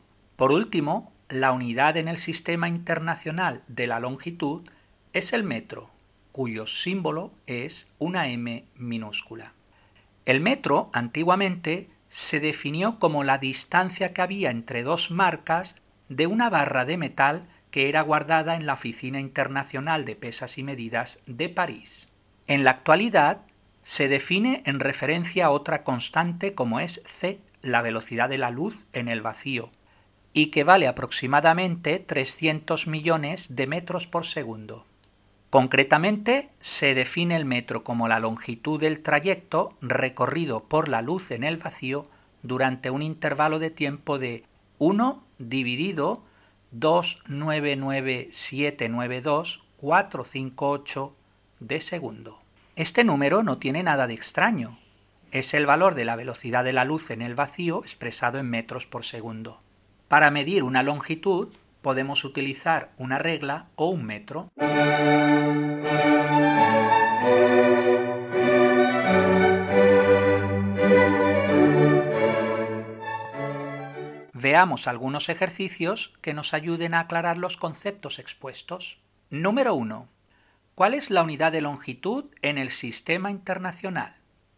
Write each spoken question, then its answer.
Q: ¿Cuál es la unidad de longitud en el sistema internacional?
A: El metro.